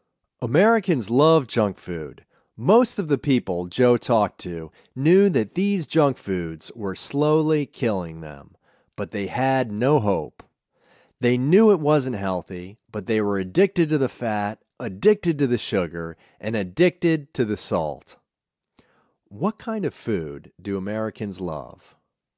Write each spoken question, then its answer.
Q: What kind of food do Americans love?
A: Americans love junk food.